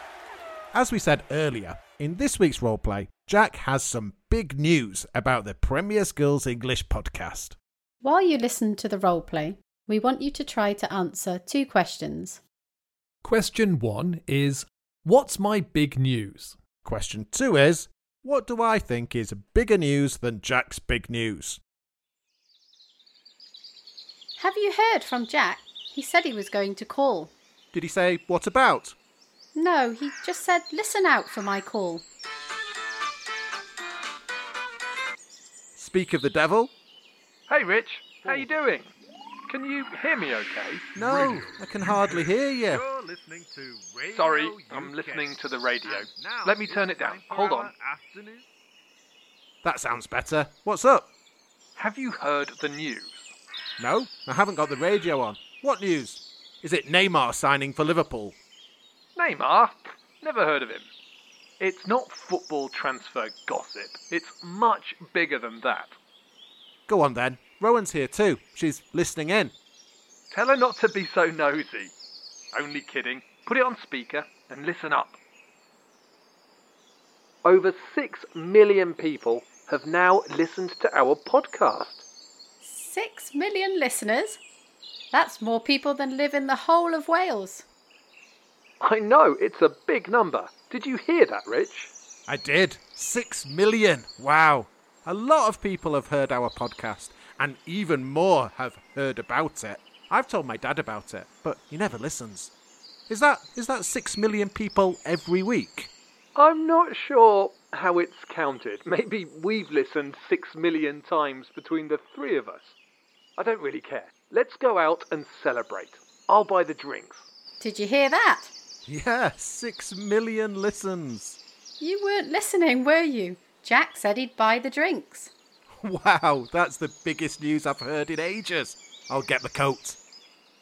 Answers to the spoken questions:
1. My big news was that our podcast has had 6 million listens.
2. Well, it's that Jack decided to buy the drinks for us all.